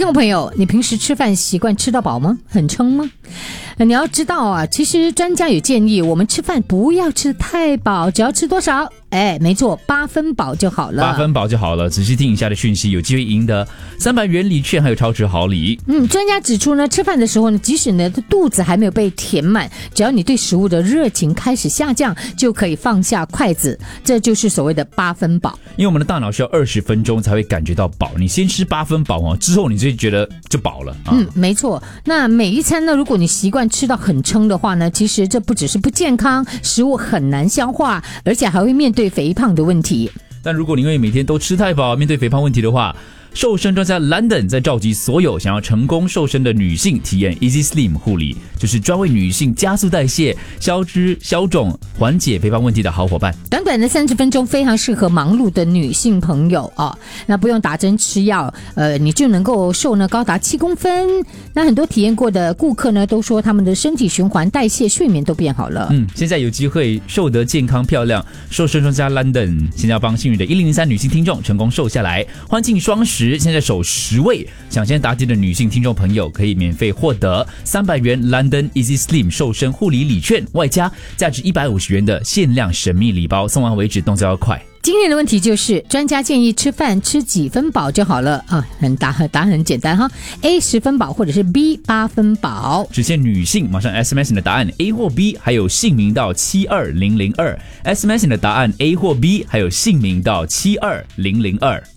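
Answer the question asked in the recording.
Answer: B: 8分饱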